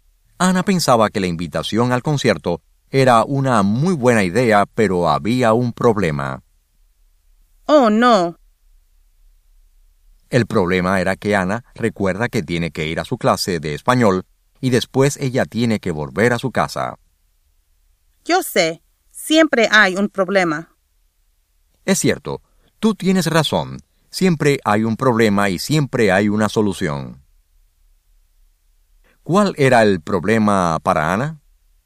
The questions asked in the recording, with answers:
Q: ¿Cuál era el problema para Ana?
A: El problema era que Ana recuerda que tiene que ir a su clase de español.